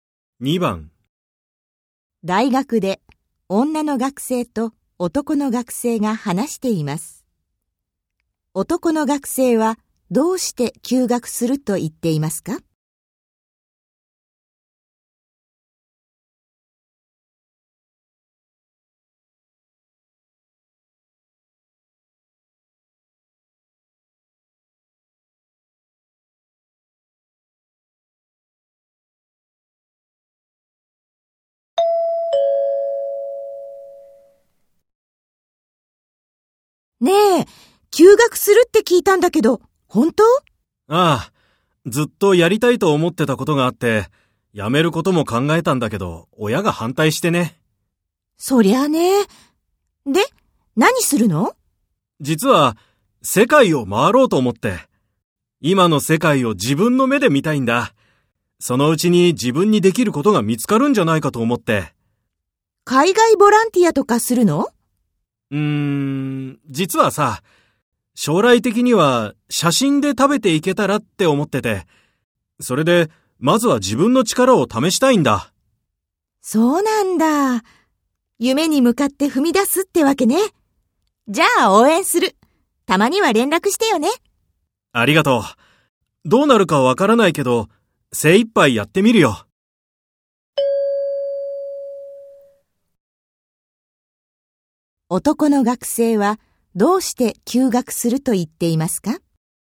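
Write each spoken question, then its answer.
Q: 男の学生はどうして休学すると言っていますか?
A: 世界を回って、写真家としての自分の力を試したいから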